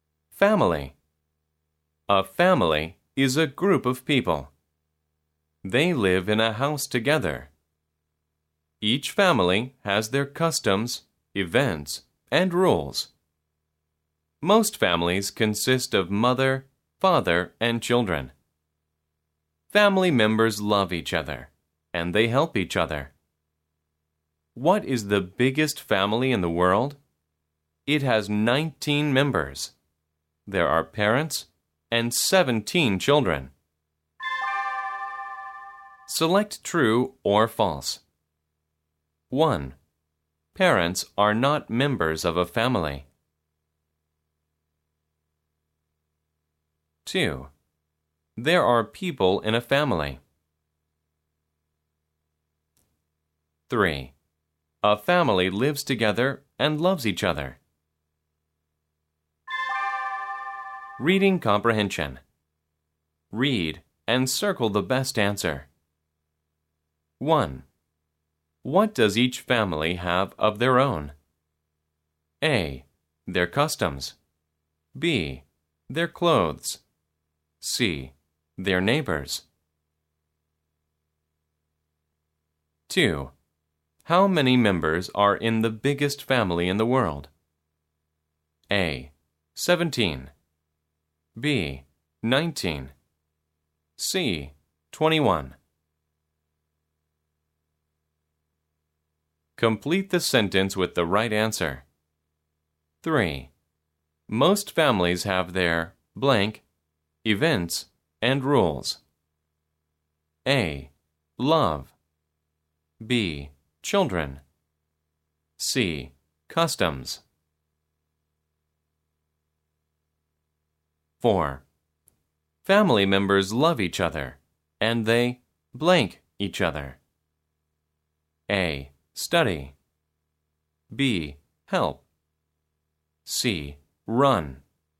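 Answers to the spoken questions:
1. False
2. True
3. True
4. A: Their customs.
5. B: 19.
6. C: Customs.
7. B: Help.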